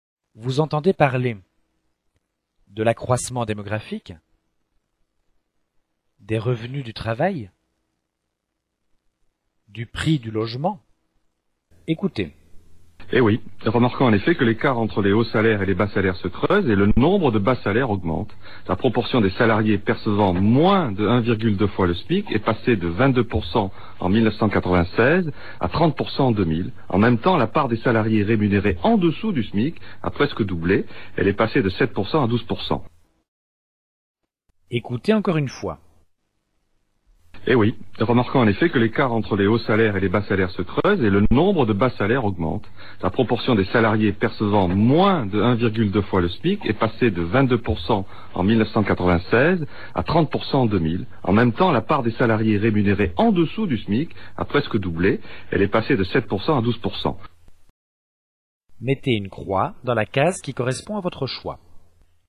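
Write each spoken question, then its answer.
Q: Vous entendez parler de l'accroissement démographique, des revenus du travail, du prix du logement.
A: des revenus du travail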